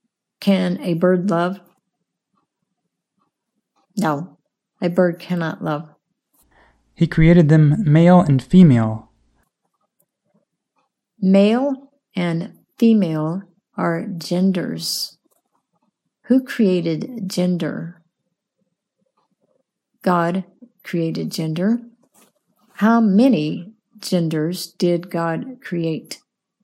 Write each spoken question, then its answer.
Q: How many genders did God create?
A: God created two genders.